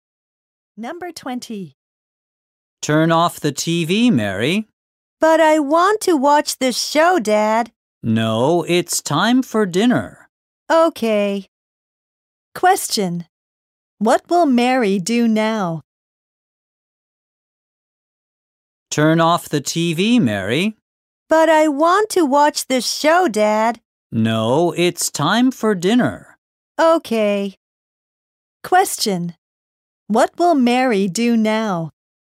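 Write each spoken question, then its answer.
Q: What will Mary do now?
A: Eat dinner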